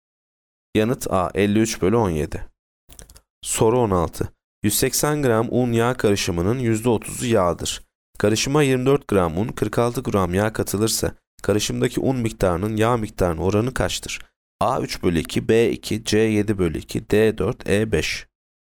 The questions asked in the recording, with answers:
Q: Karışıma 24 gram un, 46 gram yağ katılırsa, karışımdaki un miktarının yağ miktarının oranı kaçtır?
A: Yanıt A 3 bölü 2.